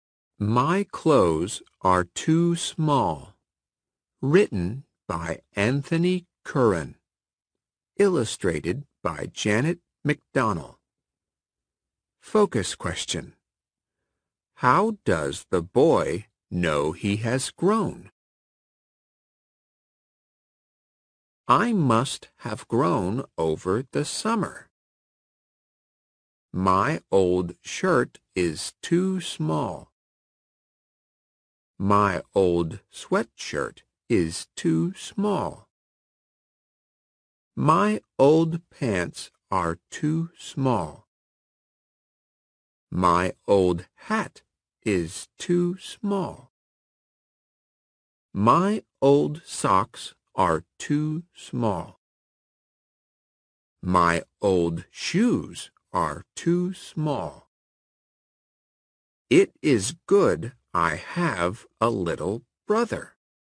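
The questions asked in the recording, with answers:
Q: How does the boy know he has grown?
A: His old clothes are too small.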